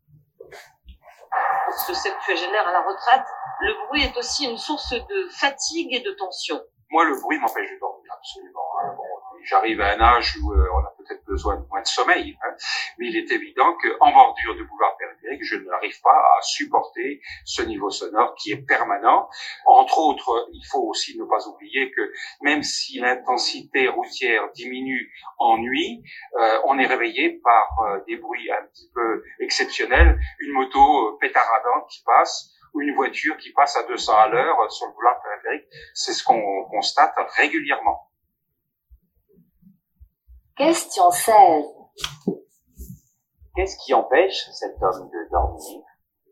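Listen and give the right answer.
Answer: Le bruit (du boulevard périphérique)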